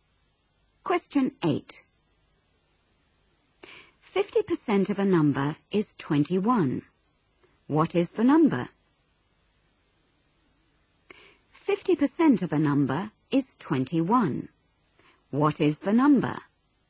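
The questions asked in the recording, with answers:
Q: 50% of a number is 21. What is the number?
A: 42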